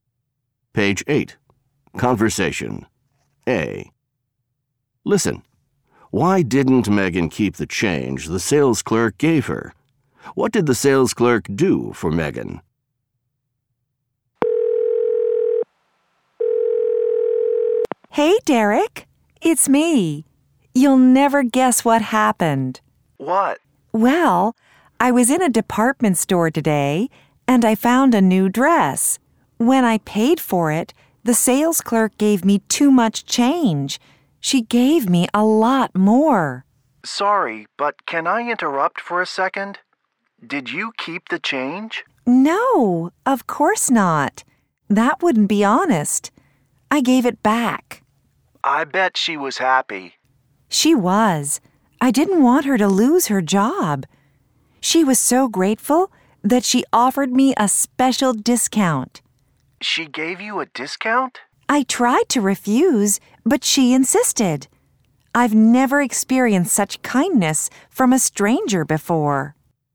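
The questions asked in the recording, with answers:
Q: Why didn't Megan keep the change the sales clerk gave her?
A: It wouldn't be honest, and she didn't want the clerk to lose her job.

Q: What did the sales clerk do for Megan?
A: She gave Megan a special discount.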